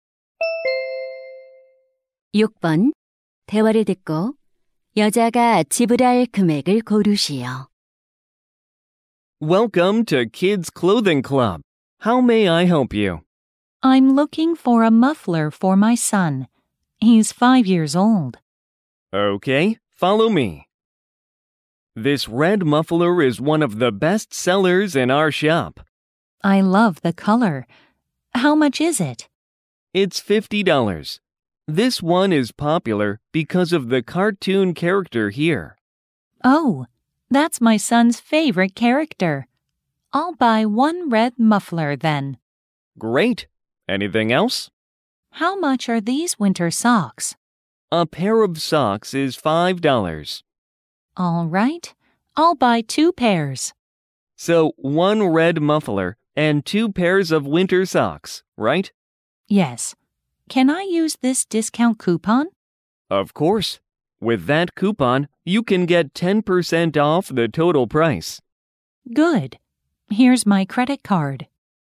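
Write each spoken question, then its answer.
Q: 대화를 듣고 여자가 지불할 금액을 고르시오.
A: $54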